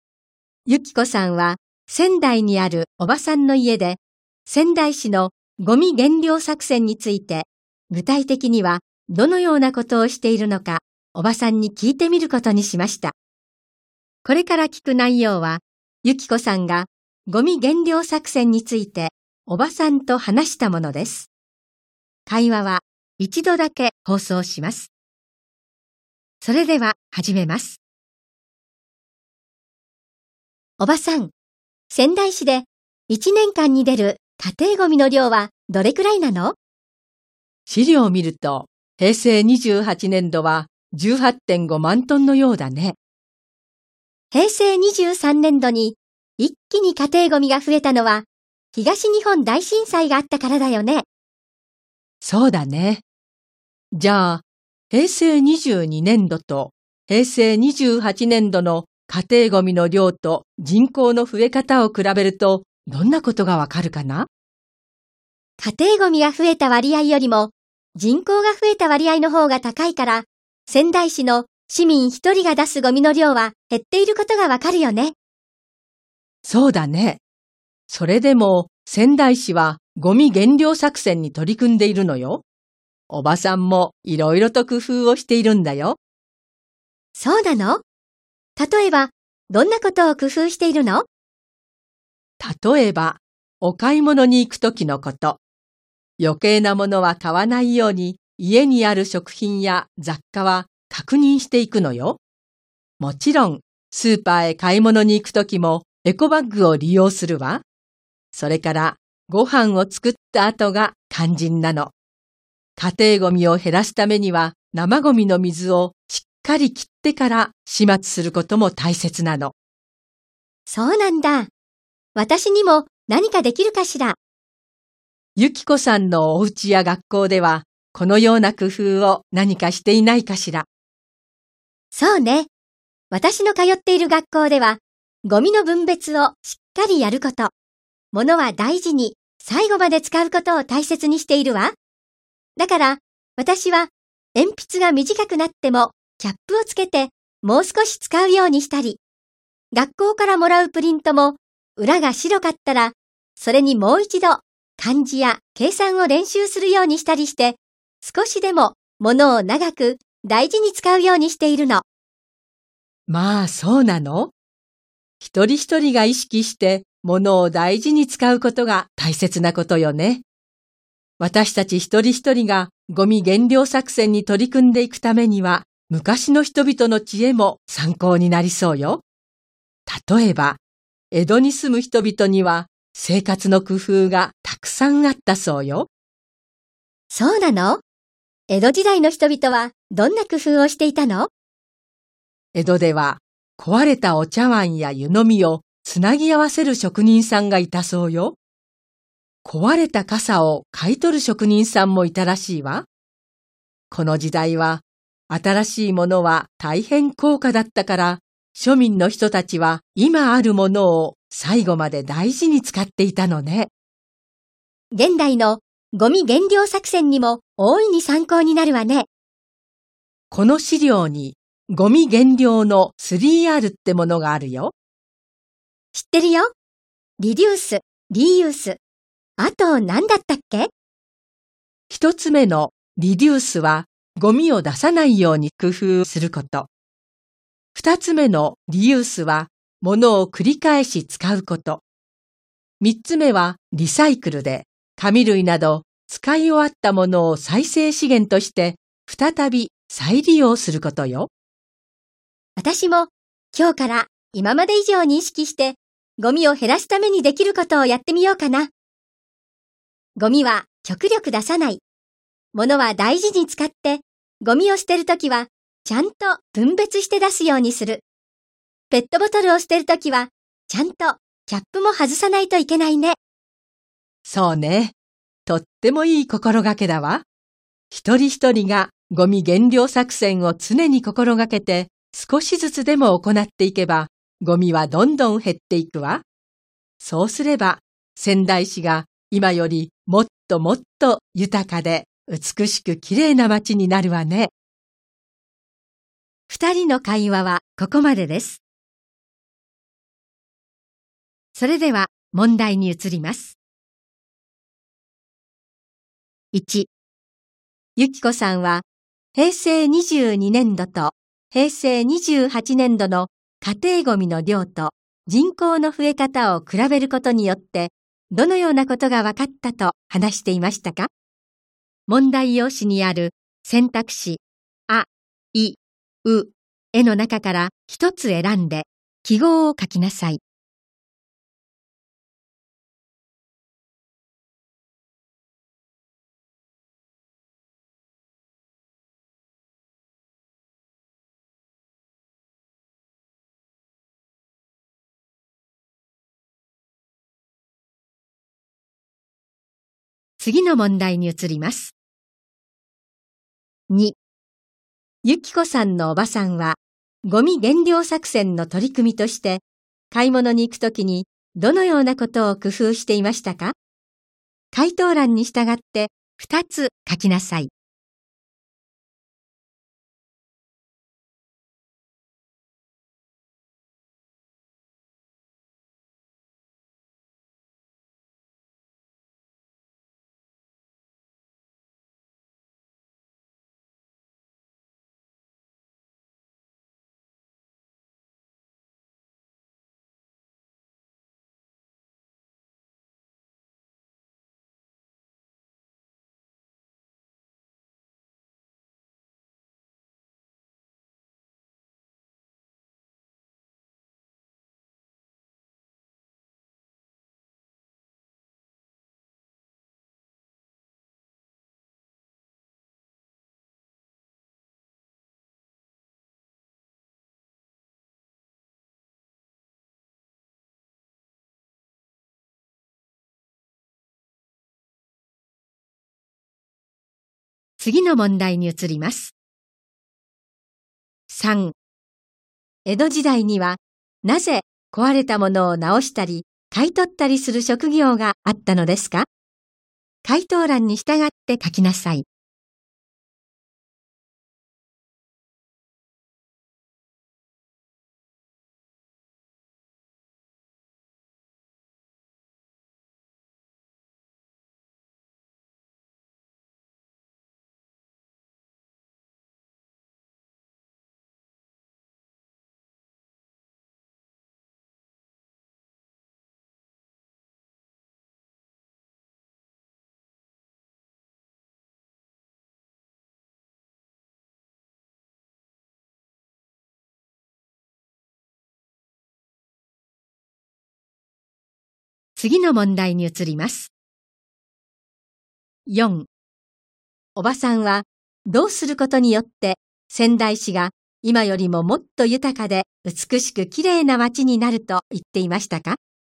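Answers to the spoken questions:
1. 市民一人が出すゴミの量は減っていること
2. 家にある食品や雑貨を確認して余計なものを買わないこと、エコバッグを利用すること
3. 新しいものは大変高価だったので、庶民は今あるものを最後まで大事に使っていたから
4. 一人一人がゴミ減量作戦を常に心がけて、少しずつでも行っていくこと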